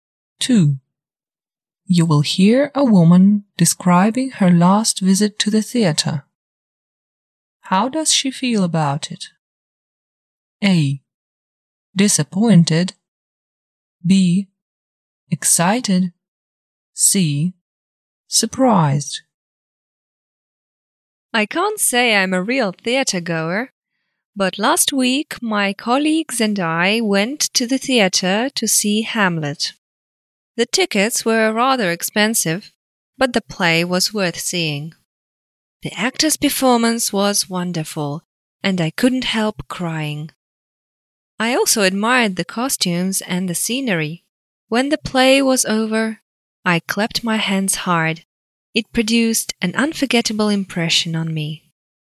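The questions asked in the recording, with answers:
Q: How does she feel about it?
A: B. Excited.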